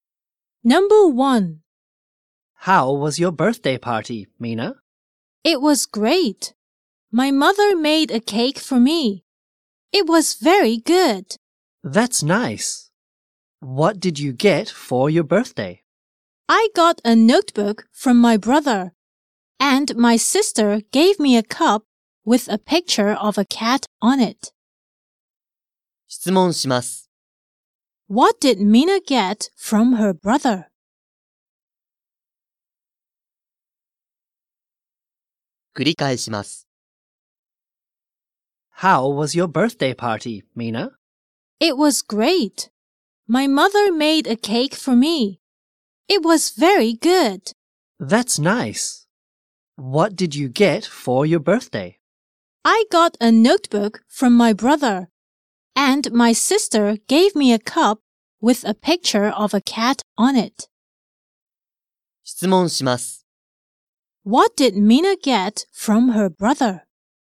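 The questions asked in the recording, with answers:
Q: What did Mina get from her brother?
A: A notebook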